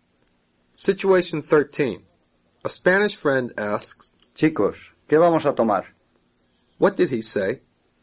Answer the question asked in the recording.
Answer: Guys, what are we going to have?